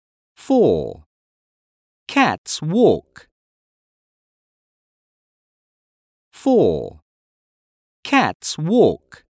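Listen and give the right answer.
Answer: yes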